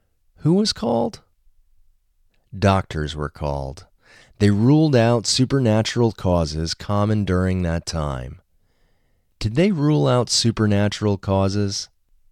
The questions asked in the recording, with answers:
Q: Did they rule out supernatural causes?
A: Yes, they ruled out supernatural causes.